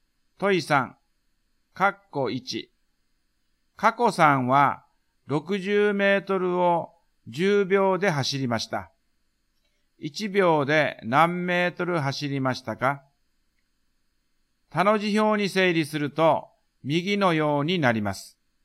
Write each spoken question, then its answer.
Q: 1秒で何メートル走りましたか?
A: 1秒間に6メートルですね。